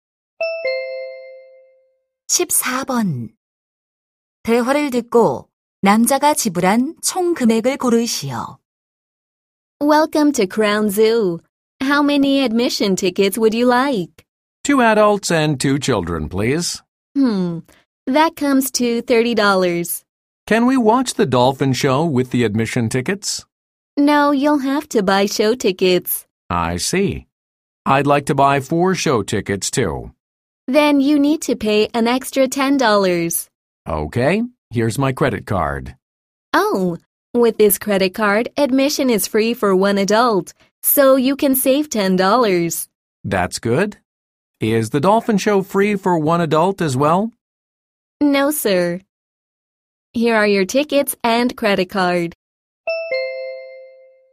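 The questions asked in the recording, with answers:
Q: 대화를 듣고 남자가 지불한 총 금액을 고르시오.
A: $30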